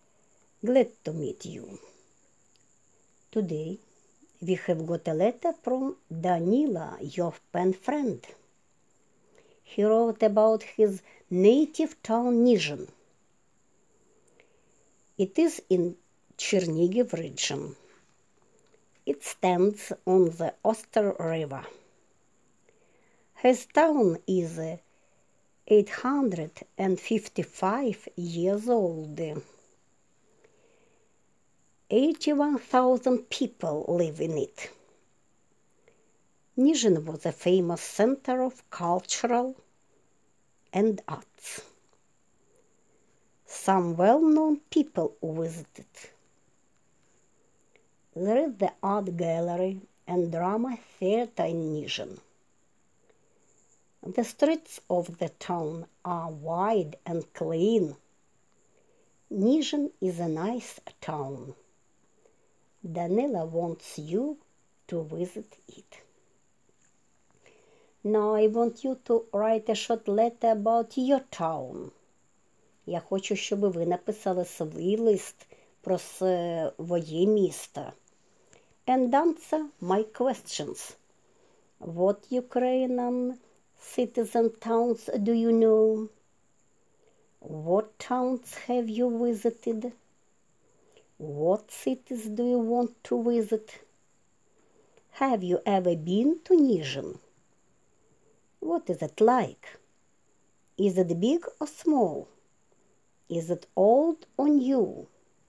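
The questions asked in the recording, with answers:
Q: Is it old or new?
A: Old (855 years old)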